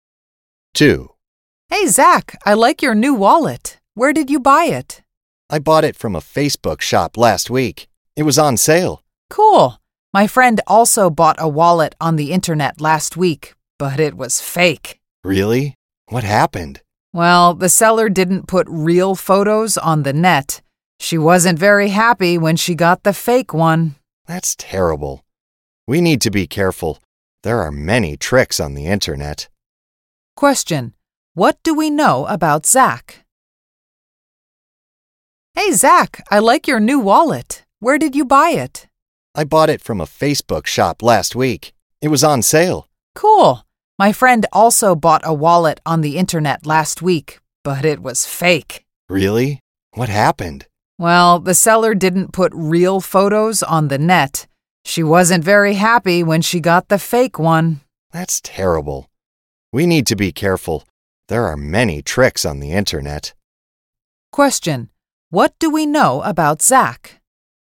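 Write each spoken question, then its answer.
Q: What do we know about Zach?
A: He bought his new wallet on sale from a Facebook shop last week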